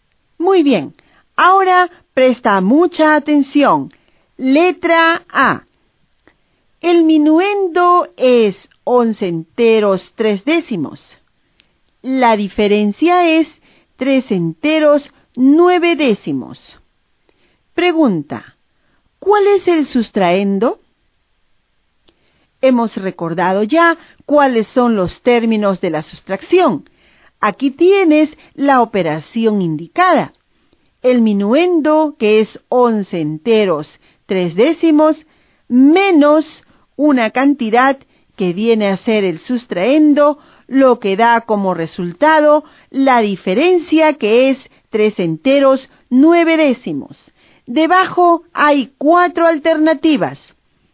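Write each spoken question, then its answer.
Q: Pregunta, ¿cuál es el sustraendo?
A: 7 enteros 4 décimos (7,4)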